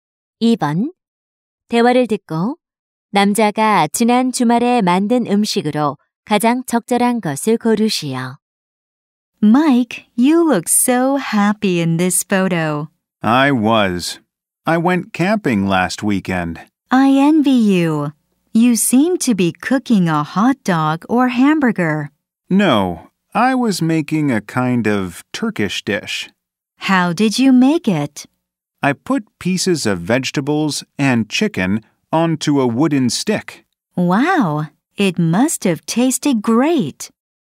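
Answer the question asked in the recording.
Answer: 채소와 닭고기를 나무 꼬치에 꽂은 터키 요리 (케밥)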